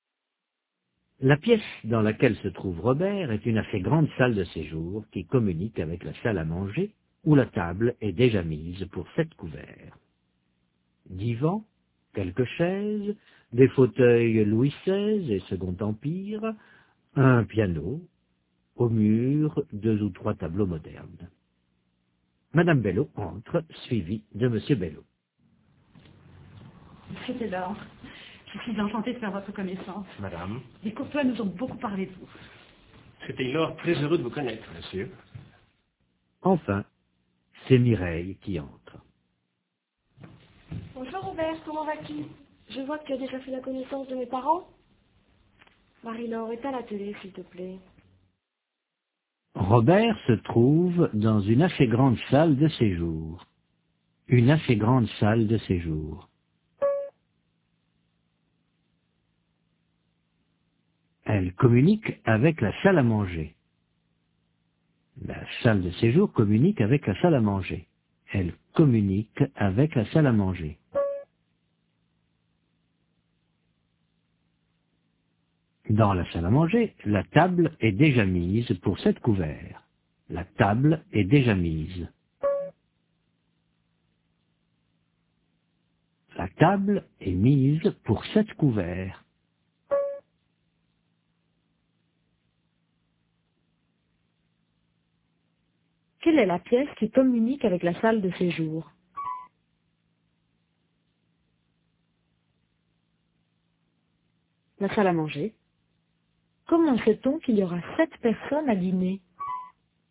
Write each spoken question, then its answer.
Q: Quelle est la pièce qui communique avec la salle de séjour?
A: La salle à manger.

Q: Comment sait-on qu'il y aura 7 personnes à dîner?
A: Parce que la table est mise pour 7 couverts.